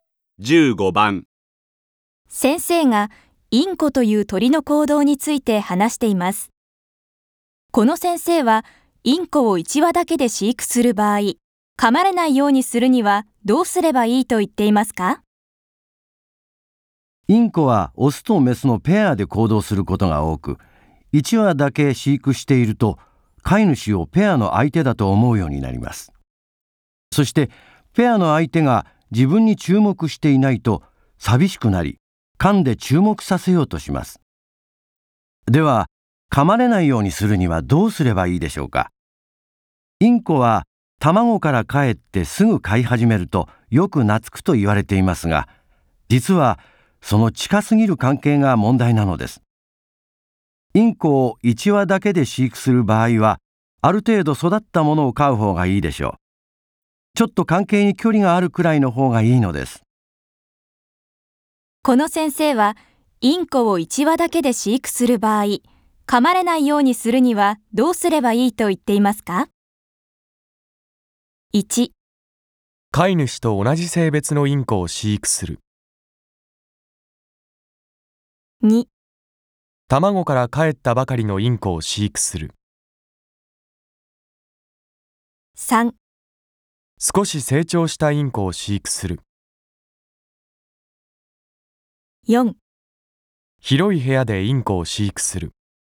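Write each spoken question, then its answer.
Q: この先生はインコを1羽だけで飼育する場合、噛まれないようにするにはどうすればいいと言っていますか?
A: 3: 少し成長したインコを飼育する。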